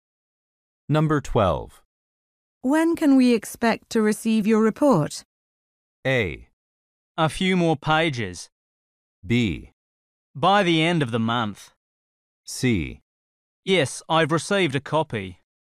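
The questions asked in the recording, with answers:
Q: When can we expect to receive your report?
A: B: By the end of the month.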